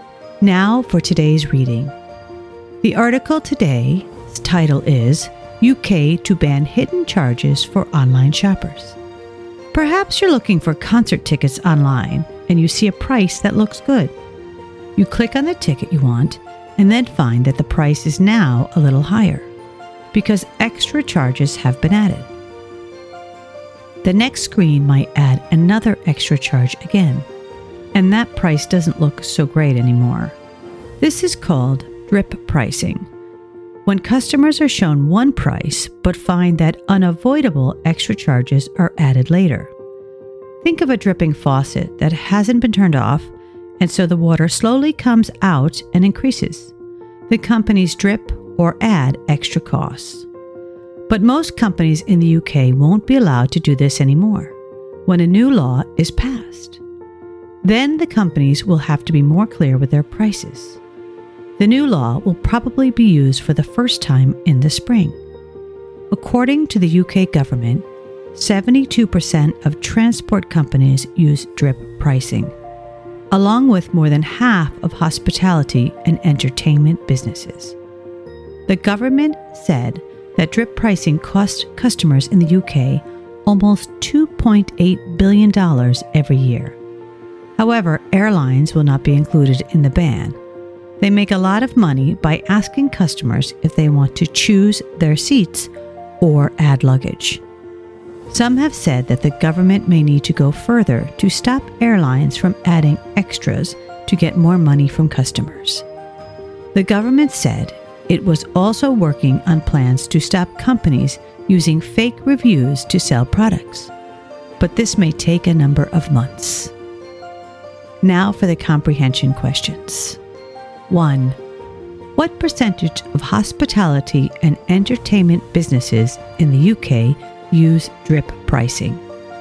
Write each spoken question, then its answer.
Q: What percentage of hospitality and entertainment businesses in the UK use drip pricing?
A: more than 50%.